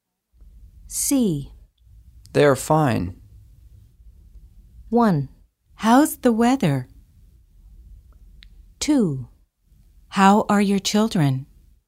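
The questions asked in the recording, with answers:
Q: They're fine.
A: 2: How are your children?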